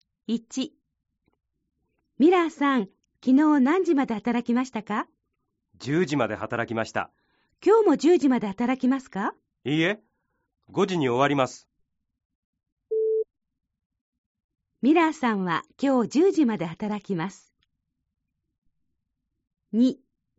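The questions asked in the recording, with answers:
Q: ミラーさんは今日10時まで働きます。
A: ×(今日は5時に終わります)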